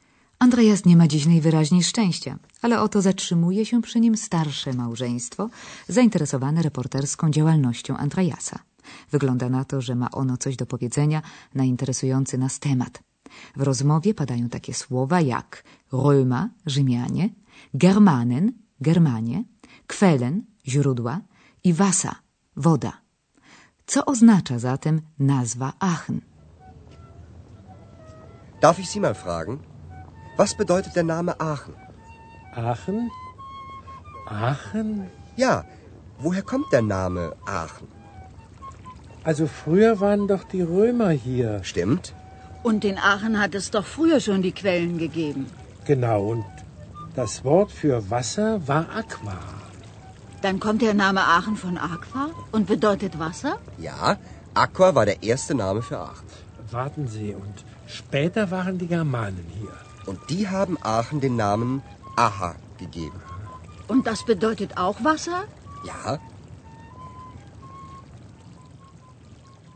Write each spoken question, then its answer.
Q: Co oznacza zatem nazwa Aachen?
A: Czy zrozumieli Państwo, że nazwa miasta związana jest ściśle z określeniem na wodę, najpierw rzymskim aqua, a następnie germańskim aha?